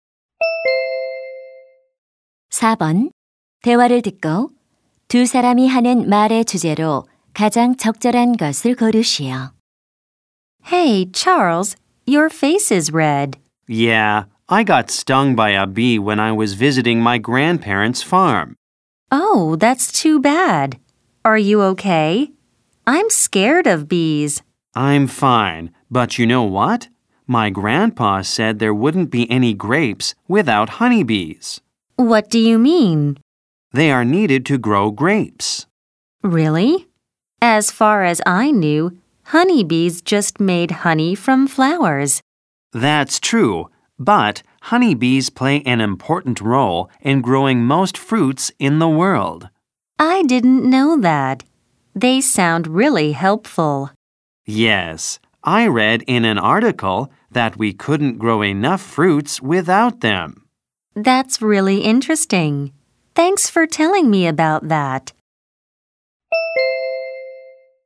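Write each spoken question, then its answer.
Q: 대화를 듣고 두 사람이 하는 말의 주제로 가장 적절한 것을 고르시오.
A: 과일 재배에서 꿀벌의 중요한 역할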